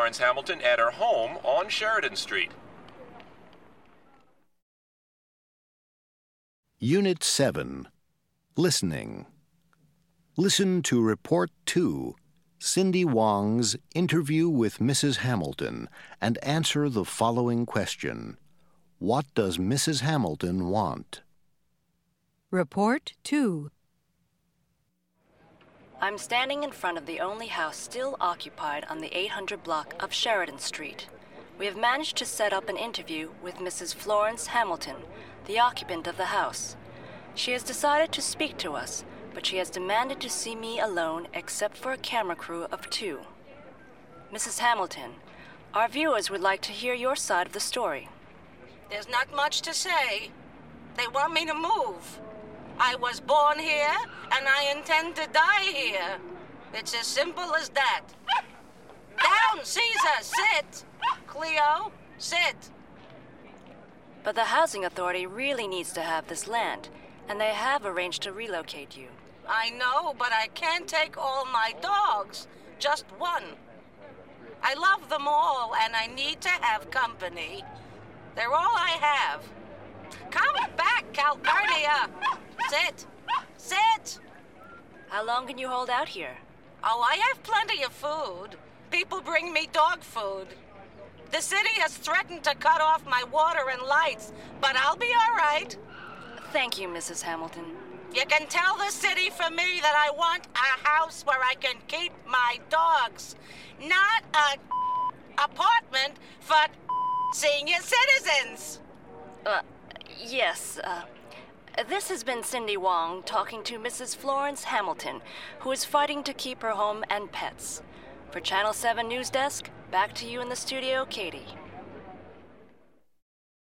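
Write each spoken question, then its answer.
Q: What does Mrs. Hamilton want?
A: A house where she can keep her dogs, not an apartment for senior citizens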